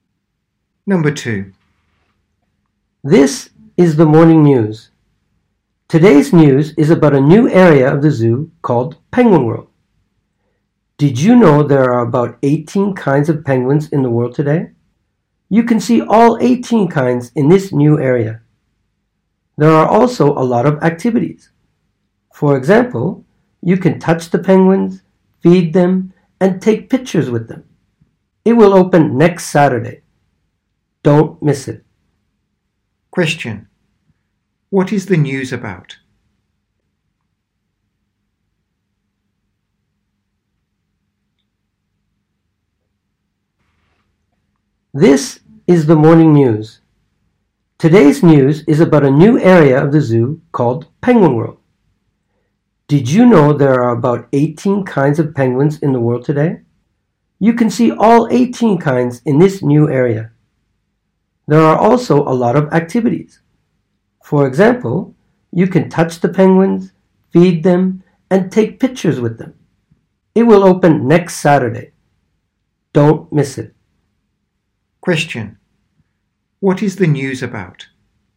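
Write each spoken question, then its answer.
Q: What is the news about?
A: A new penguin area at the zoo, Penguin World.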